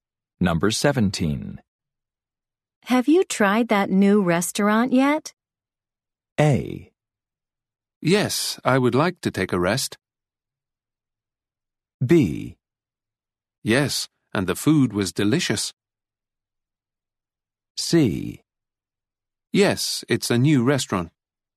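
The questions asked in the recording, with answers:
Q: Have you tried that new restaurant yet?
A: B: Yes, and the food was delicious.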